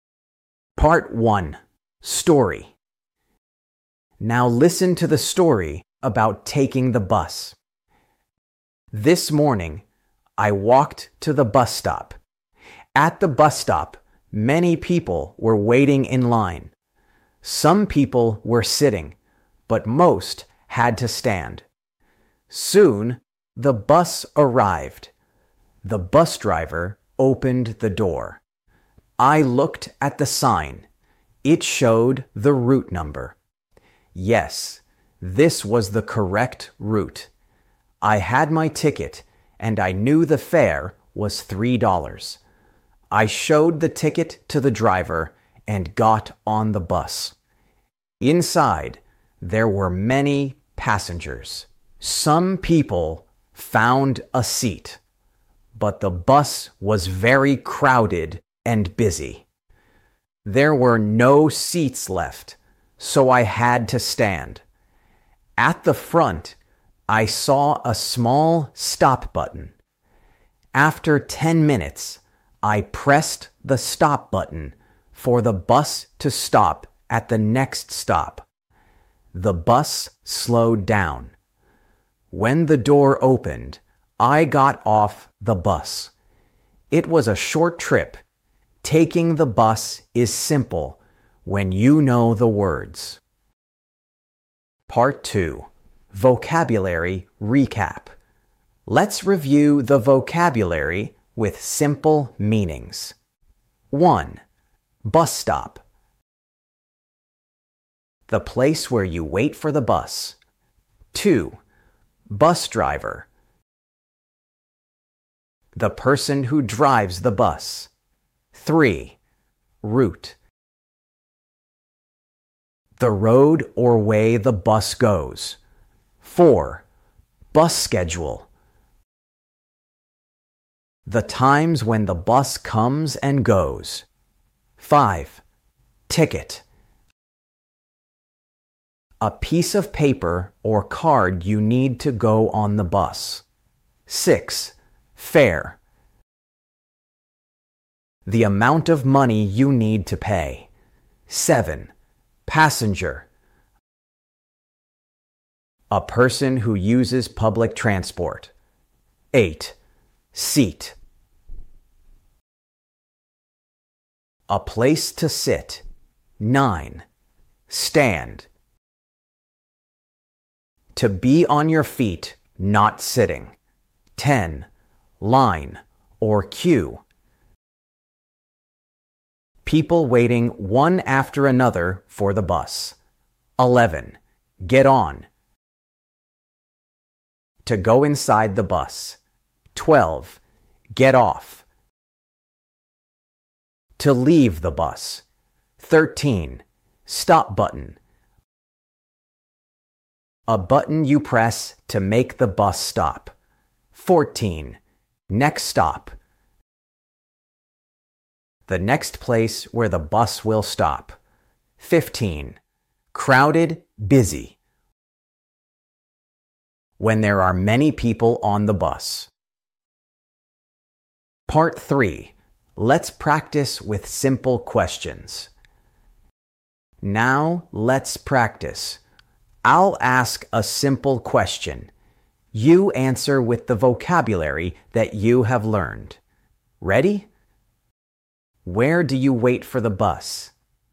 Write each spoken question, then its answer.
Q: Where do you wait for the bus?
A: Bus stop. That's right. You wait for the bus at a bus stop.